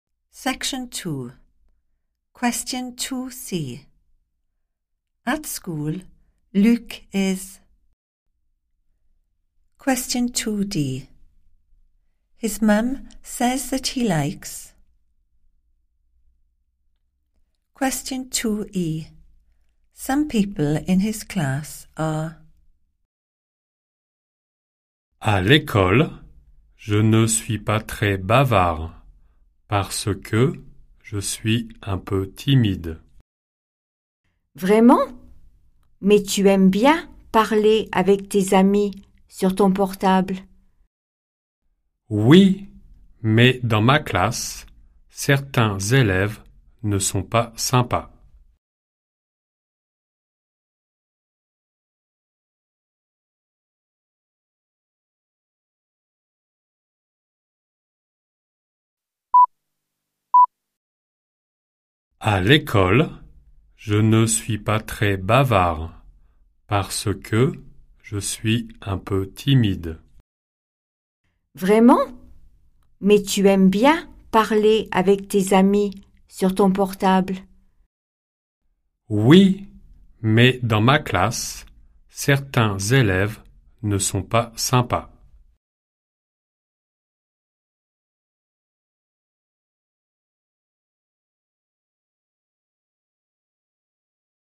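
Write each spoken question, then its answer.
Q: At school, Luc is...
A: not very chatty, a bit shy

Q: His mum says that he likes.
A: talking with his friends on his mobile

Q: Some people in his class are.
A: not nice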